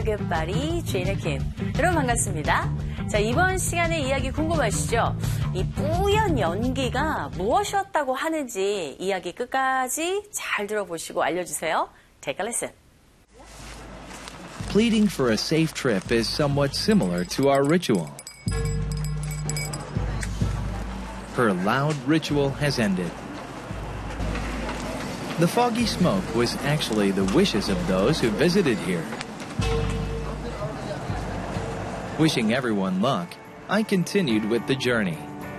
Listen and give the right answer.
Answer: 바로 이곳을 방문했던 사람들의 소원, 소망이 바로 이 뿌연 연기였다라는 거죠.